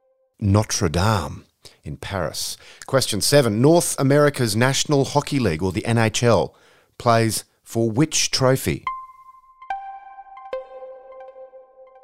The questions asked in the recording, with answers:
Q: North America's National Hockey League, or the NHL, plays for which trophy?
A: The Stanley Cup.